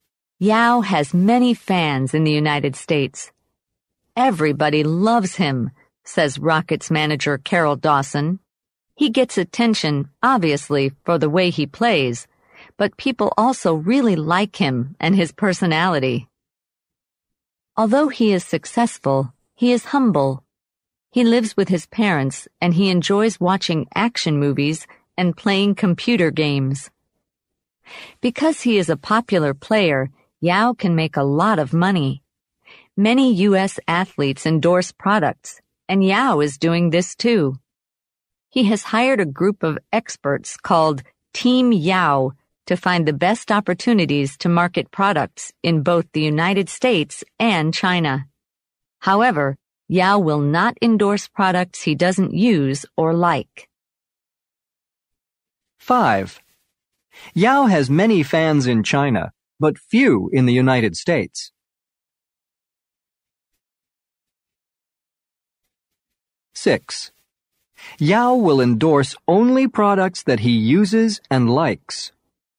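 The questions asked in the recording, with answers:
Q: Yao has many fans in China, but few in the United States.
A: False

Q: Yao will endorse only products that he uses and likes.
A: True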